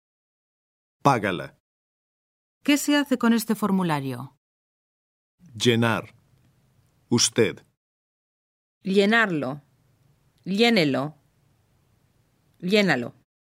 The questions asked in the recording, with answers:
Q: ¿Qué se hace con este formulario?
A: Llénelo.